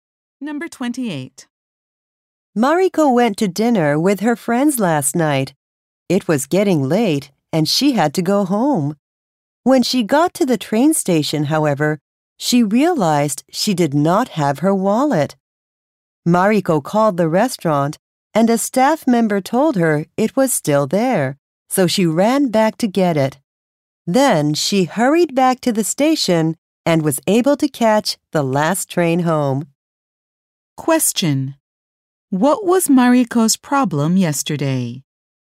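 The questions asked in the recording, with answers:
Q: What was Mariko's problem yesterday?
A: She left her wallet at the restaurant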